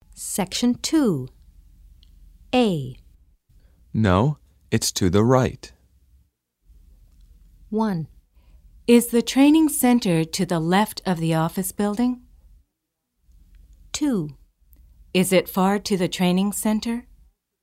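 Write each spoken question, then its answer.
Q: No, it's to the right.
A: 1: Is the training center to the left of the office building?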